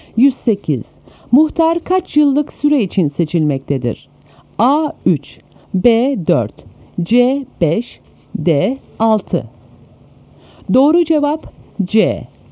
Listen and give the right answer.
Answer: Doğru cevap C.